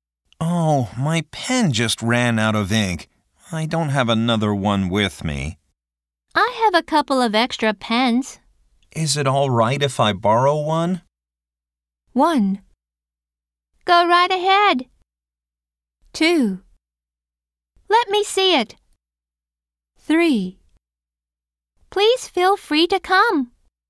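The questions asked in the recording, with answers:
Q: Is it all right if I borrow one?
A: 1: Go right ahead.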